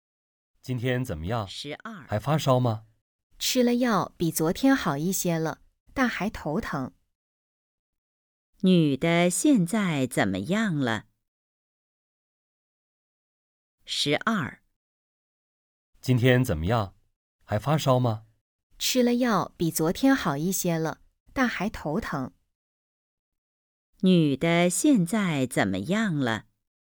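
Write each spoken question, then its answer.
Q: 女的现在怎么样了?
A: 比昨天好一些了,但还头疼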